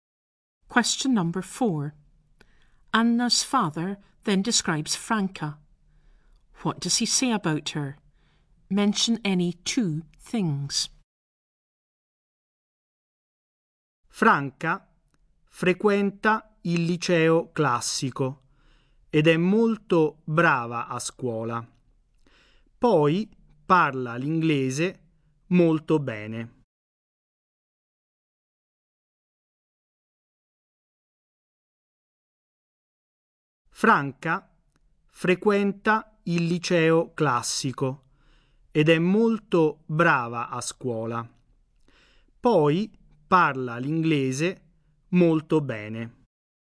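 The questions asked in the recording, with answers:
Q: Anna's father then describes Franca. What does he say about her?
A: She attends the classical high school, is very good at school, and speaks English very well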